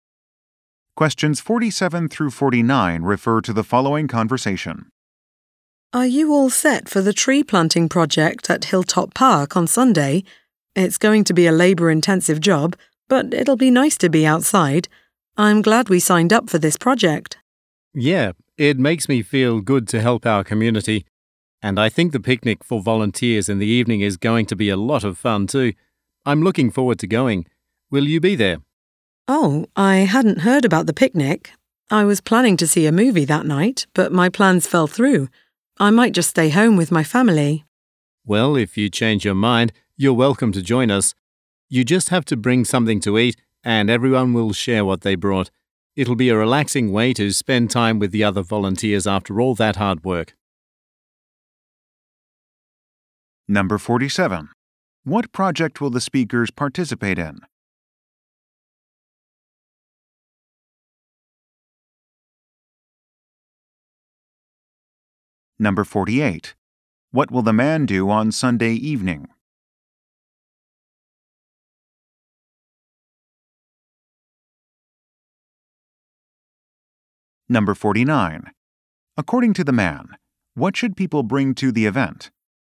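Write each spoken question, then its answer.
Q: What project will the speakers participate in?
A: Tree planting at Hilltop Park

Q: According to the man, what should people bring to the event?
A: Something to eat to share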